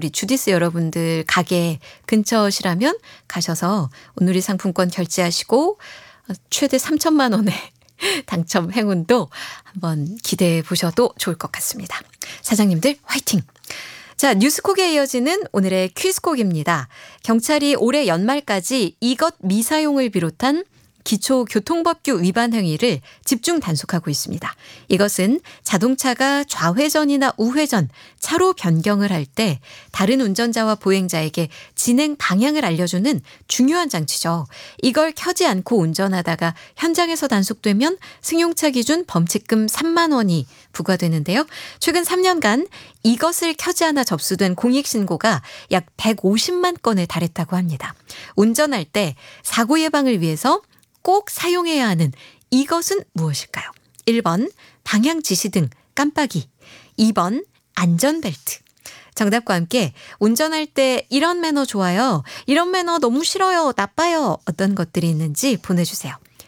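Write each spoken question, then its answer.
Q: 운전할 때 사고 예방을 위해서 꼭 사용해야 하는 이것은 무엇일까요?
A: 1: 방향 지시등 깜빡이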